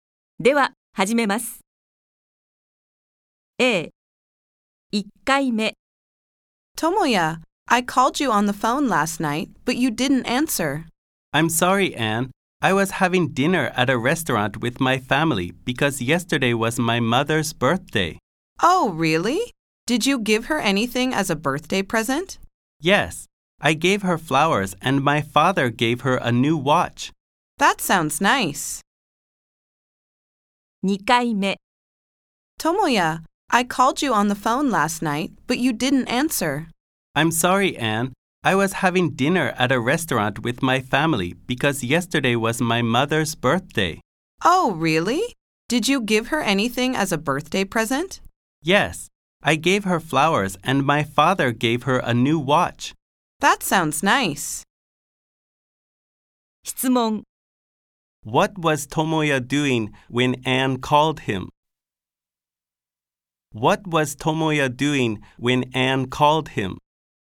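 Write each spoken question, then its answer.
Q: What was Tomoya doing when Anne called him?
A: Having dinner at a restaurant with his family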